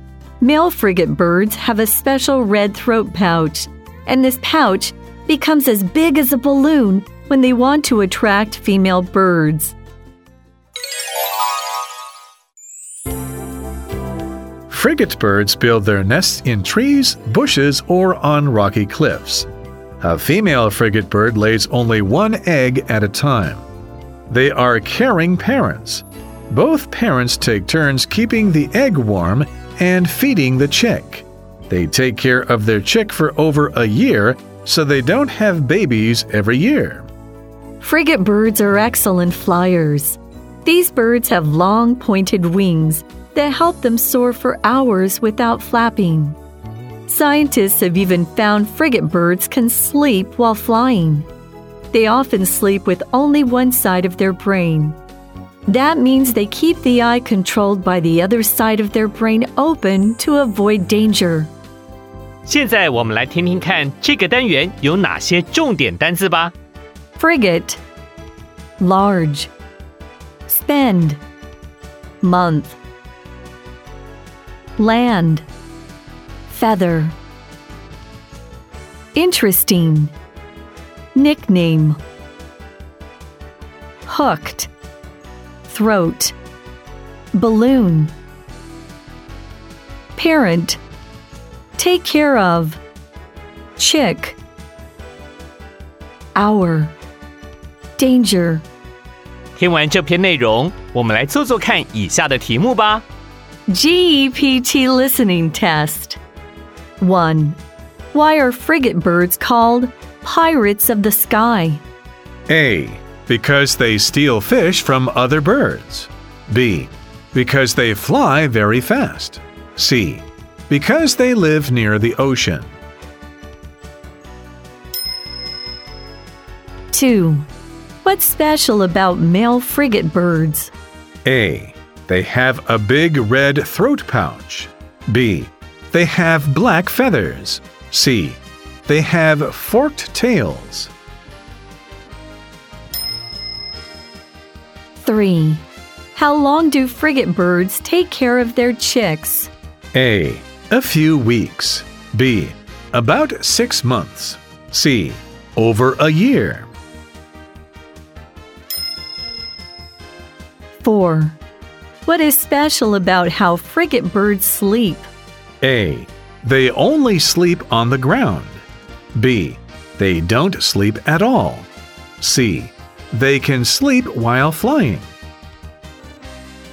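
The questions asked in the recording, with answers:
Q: What's special about male frigate birds?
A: A: They have a big red throat pouch.

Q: How long do frigate birds take care of their chicks?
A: C: Over a year.

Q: What is special about how frigate birds sleep?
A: C: They can sleep while flying.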